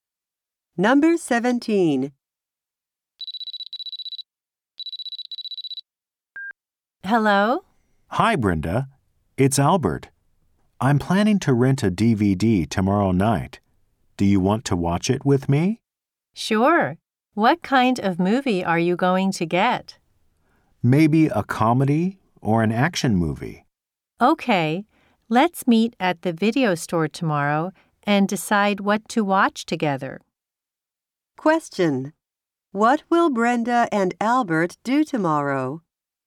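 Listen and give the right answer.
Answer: Meet at the video store and rent a DVD to watch together.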